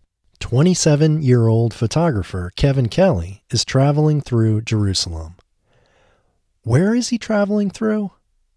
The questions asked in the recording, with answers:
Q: Where is he traveling through?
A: He is traveling through Jerusalem.